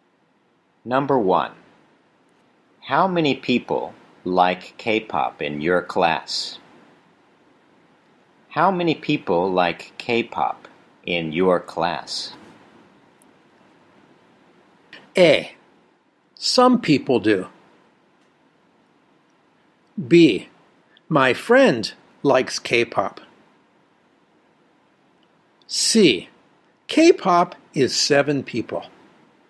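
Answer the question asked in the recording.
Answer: A: Some people do.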